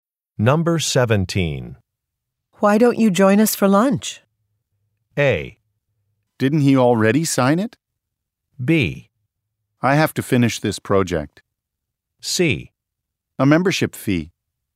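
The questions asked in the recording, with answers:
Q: Why don't you join us for lunch?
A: B: I have to finish this project.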